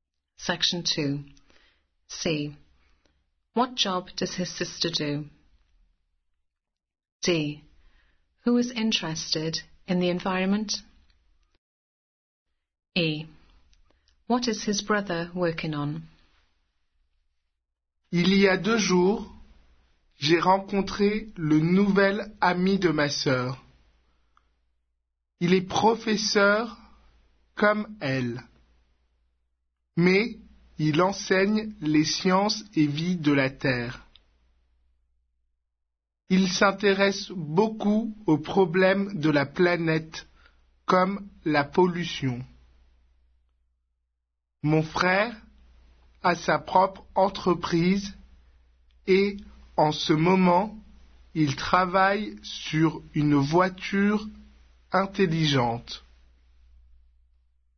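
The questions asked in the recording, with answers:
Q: What job does his sister do?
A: Teacher

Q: Who is interested in the environment?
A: His sister's new boyfriend

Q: What is his brother working on?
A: An intelligent car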